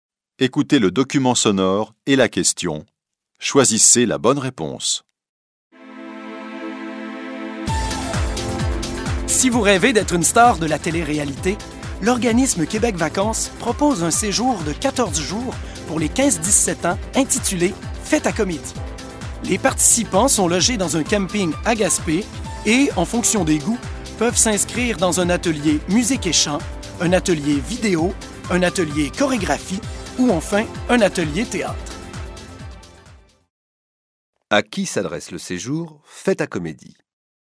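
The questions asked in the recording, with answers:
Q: À qui s'adresse le séjour « Fête à comédie »?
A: Aux 15-17 ans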